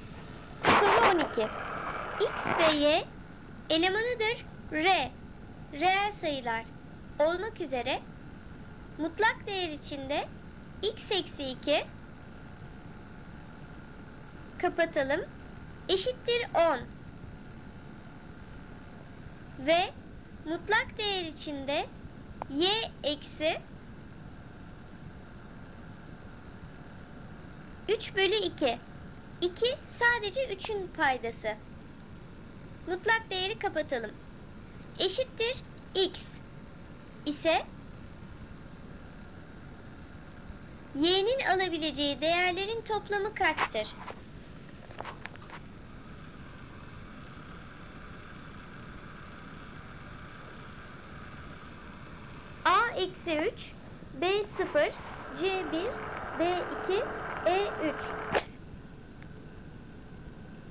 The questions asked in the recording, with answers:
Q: y'nin alabileceği değerlerin toplamı kaçtır?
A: Doğru cevap E3.